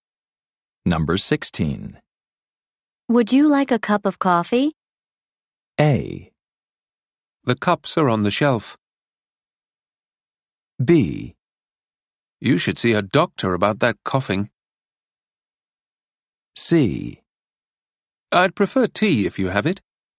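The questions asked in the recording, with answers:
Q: Would you like a cup of coffee?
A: C: I'd prefer tea if you have it.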